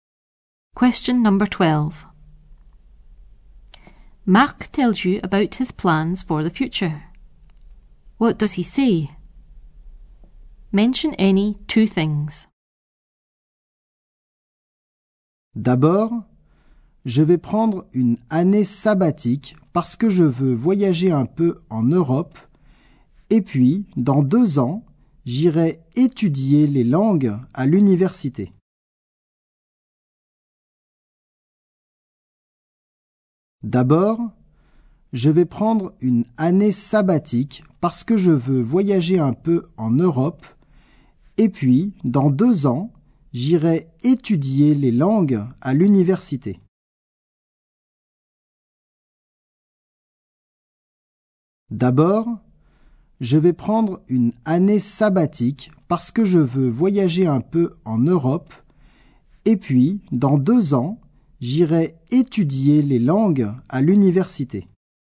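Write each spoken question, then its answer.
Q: What does he say? Mention any two things.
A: Gap year to travel in Europe; in 2 years study languages at university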